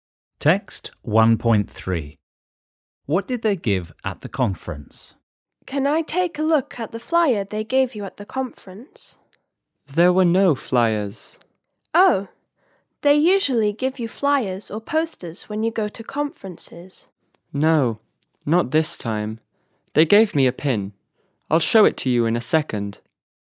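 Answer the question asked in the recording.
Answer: A pin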